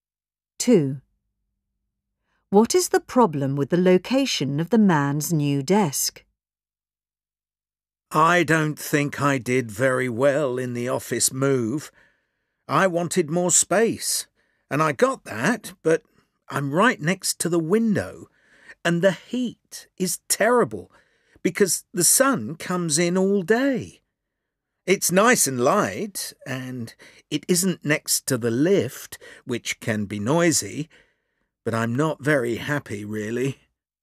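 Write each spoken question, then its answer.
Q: What is the problem with the location of the man's new desk?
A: It's too hot next to the window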